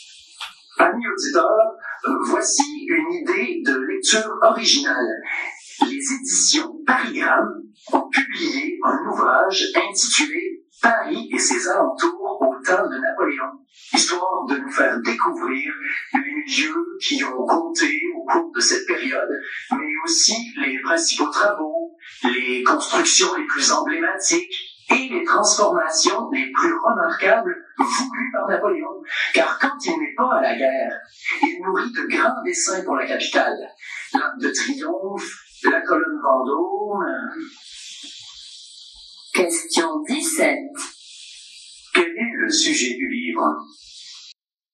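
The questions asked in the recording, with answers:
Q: Quel est le sujet du livre ?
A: Paris et ses alentours au temps de Napoléon : les travaux, constructions et transformations voulus par Napoléon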